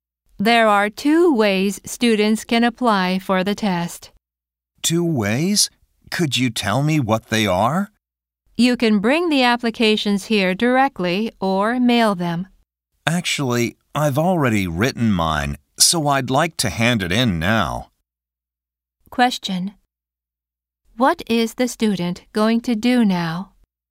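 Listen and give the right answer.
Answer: Hand in the application directly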